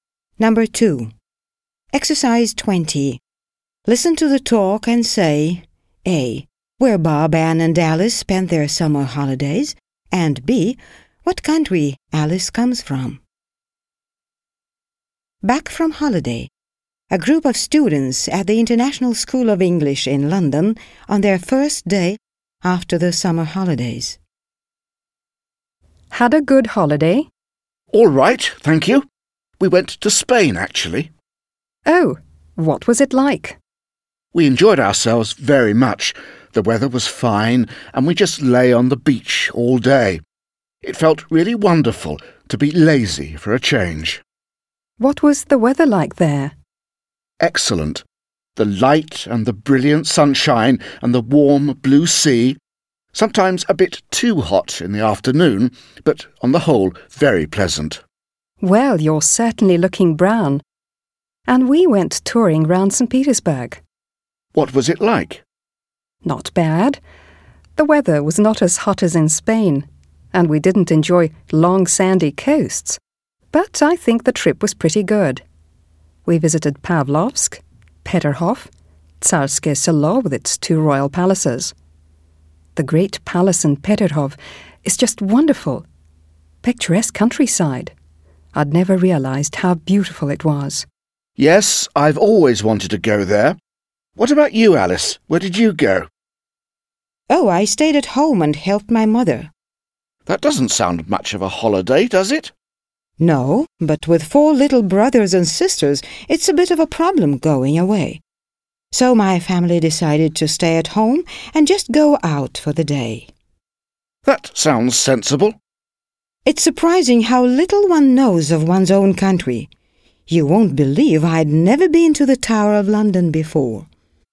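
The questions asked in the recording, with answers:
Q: What country Alice comes from.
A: England (Britain)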